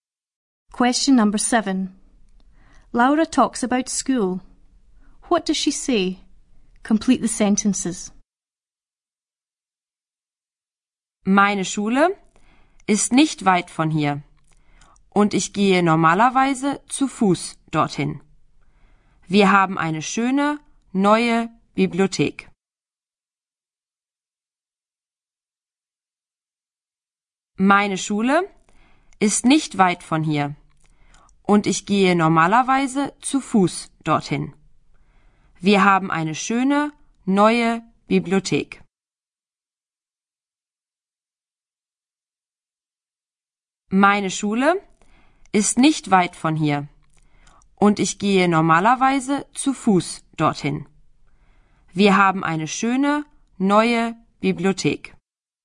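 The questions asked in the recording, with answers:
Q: What does she say? Complete the sentences.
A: School is not far away, she usually walks; they have a nice new library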